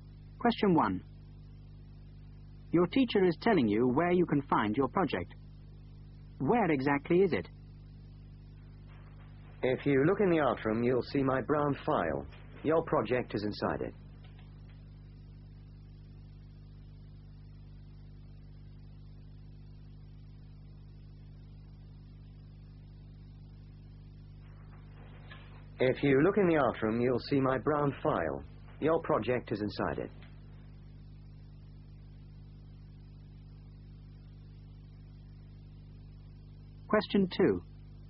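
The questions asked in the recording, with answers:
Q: Where exactly is it?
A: Inside the teacher's brown file in the art room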